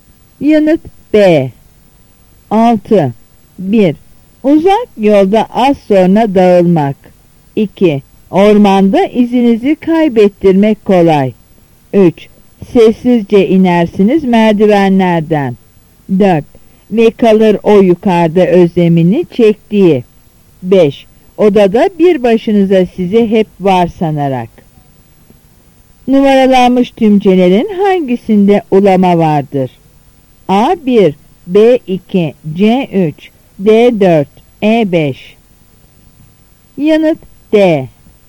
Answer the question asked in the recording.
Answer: Yanıt D.